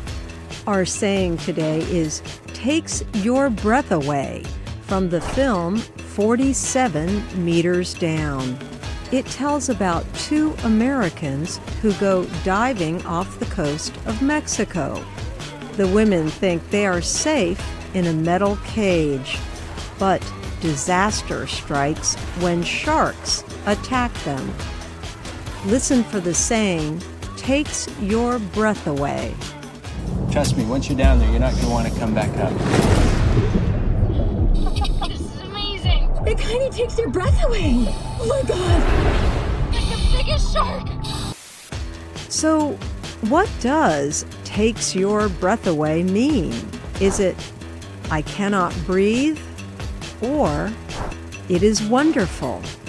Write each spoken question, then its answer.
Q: So what does takes your breath away mean? Is it, I cannot breathe? Or, it is wonderful?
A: Takes your breath away means it is wonderful.